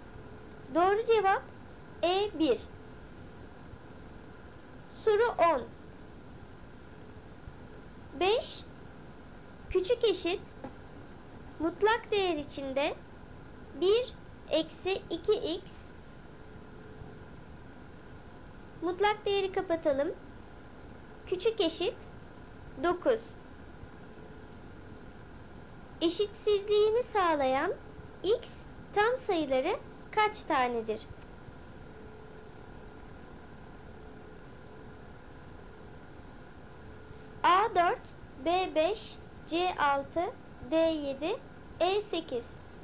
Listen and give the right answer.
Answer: Doğru cevap C6.